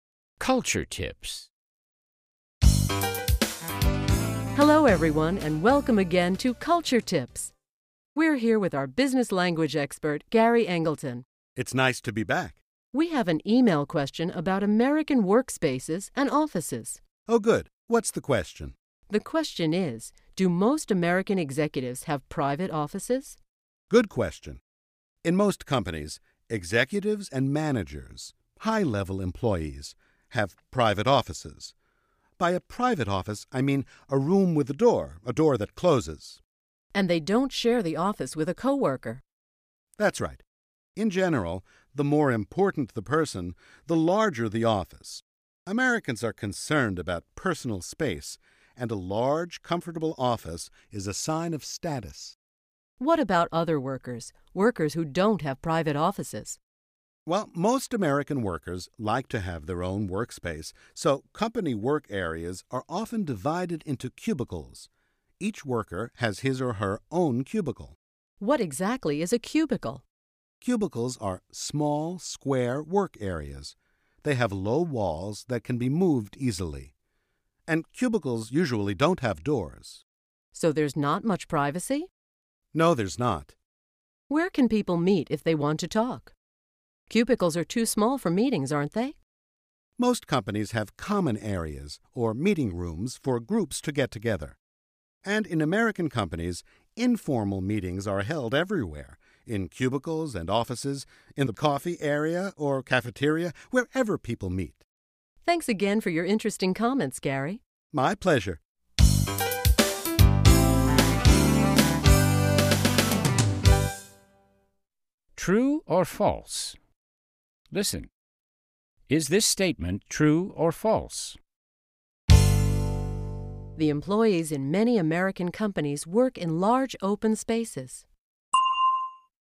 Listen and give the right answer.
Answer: False. Most Americans work in private offices or cubicles.